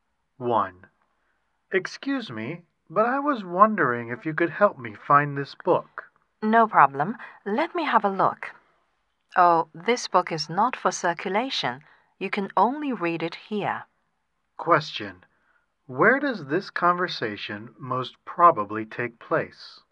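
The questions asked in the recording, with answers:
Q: Where does this conversation most probably take place?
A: In a library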